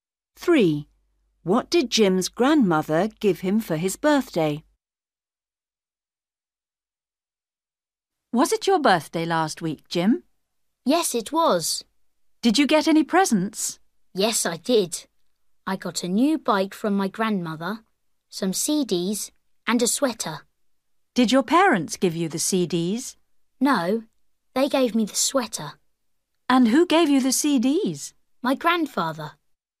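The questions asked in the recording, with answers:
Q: What did Jim's grandmother give him for his birthday?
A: a new bike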